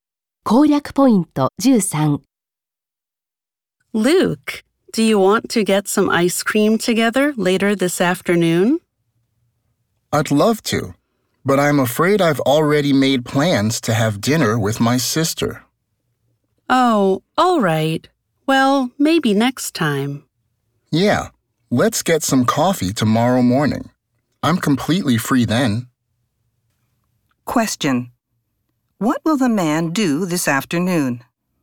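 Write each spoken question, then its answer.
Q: what will the man do this afternoon?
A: Have dinner with his sister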